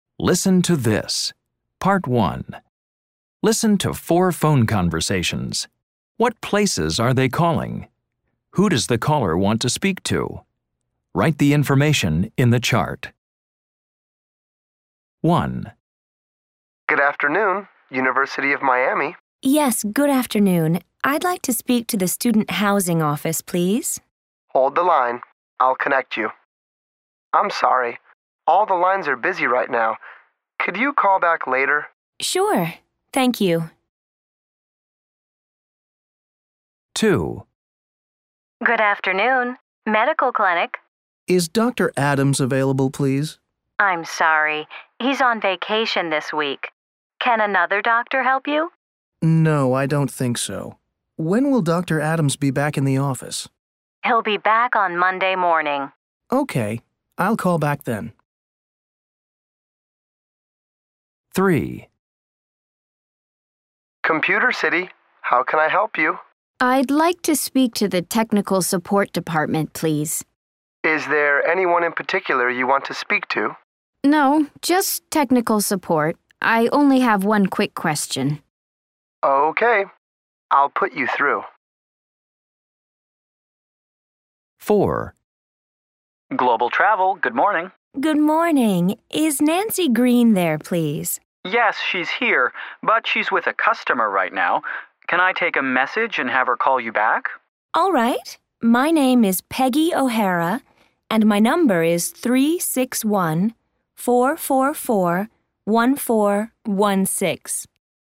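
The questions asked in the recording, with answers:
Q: What places are they calling?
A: University of Miami

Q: Who does the caller want to speak to?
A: The student housing office

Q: What places are they calling?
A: A medical clinic

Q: Who does the caller want to speak to?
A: Dr. Adams

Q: What places are they calling?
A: Computer City

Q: Who does the caller want to speak to?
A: The technical support department

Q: What places are they calling?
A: Global Travel

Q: Who does the caller want to speak to?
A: Nancy Green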